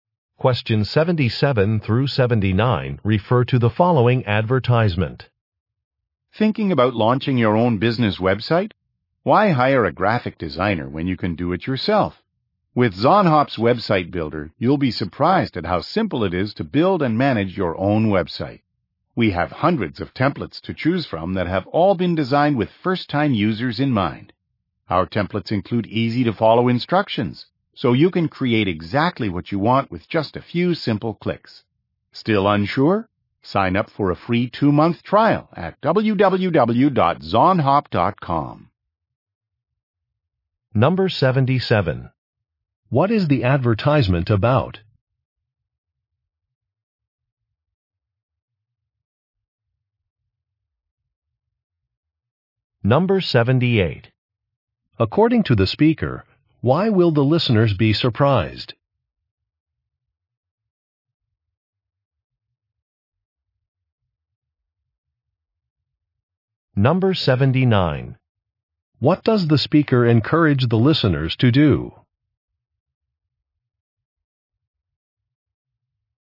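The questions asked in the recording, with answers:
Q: What is the advertisement about?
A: A website-building service

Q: According to the speaker, why will the listeners be surprised?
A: Building a website is so simple

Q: What does the speaker encourage the listeners to do?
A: Sign up for a free trial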